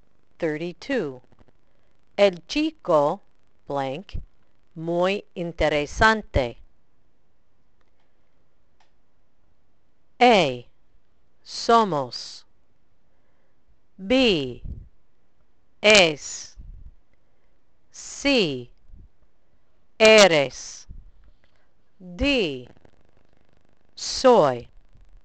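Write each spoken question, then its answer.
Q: El chico blank muy interesante.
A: B: Es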